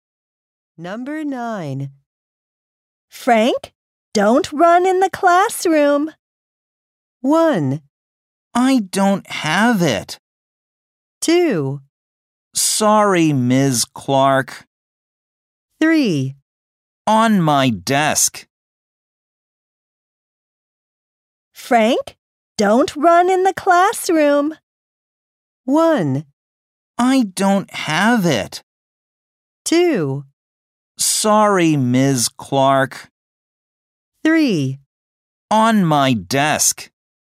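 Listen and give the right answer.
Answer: 2: Sorry, Ms. Clark.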